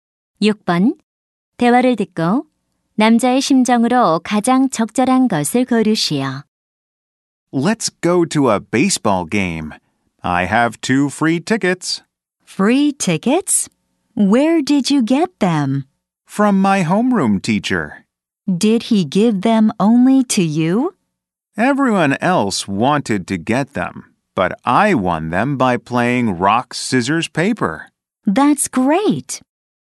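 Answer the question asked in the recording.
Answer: 기쁜, 신난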